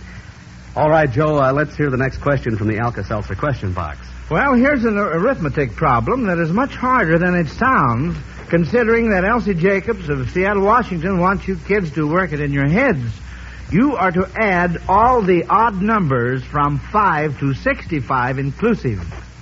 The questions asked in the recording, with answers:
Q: You are to add all the odd numbers from 5 to 65 inclusive.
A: 1085 is absolutely right.